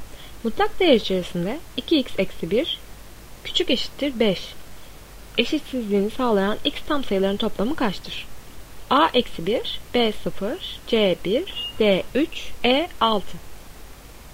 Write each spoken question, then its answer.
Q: Eşitsizliğini sağlayan x tam sayıların toplamı kaçtır?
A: Doğru cevap D 3.